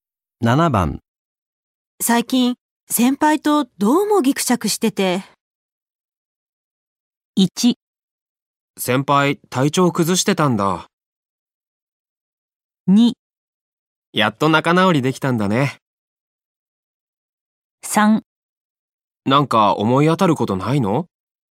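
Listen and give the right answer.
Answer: 3: なんか思い当たることないの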